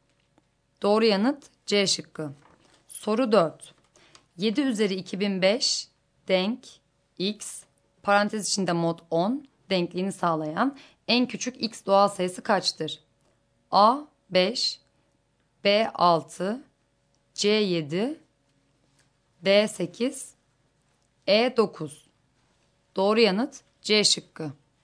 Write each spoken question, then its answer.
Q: 7 üzeri 2005 denk X, parantez içinde mod 10 denkliğini sağlayan en küçük X doğal sayısı kaçtır?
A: Doğru yanıt C şıkkı.